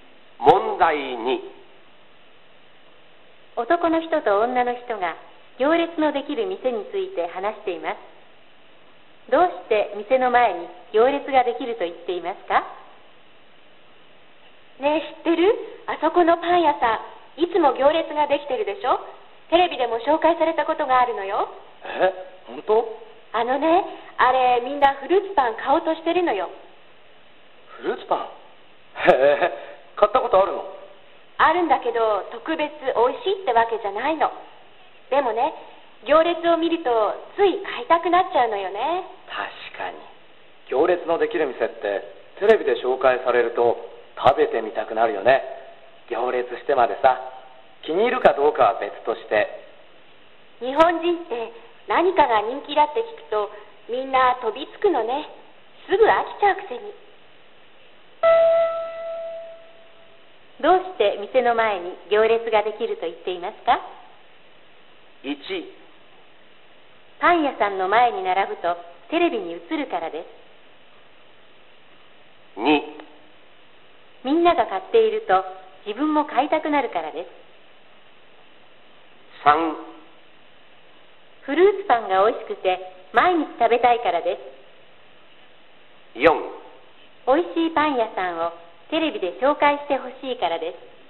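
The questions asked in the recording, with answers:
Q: どうして店の前に行列ができると言っていますか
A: 2: みんなが買っていると自分も買いたくなるからです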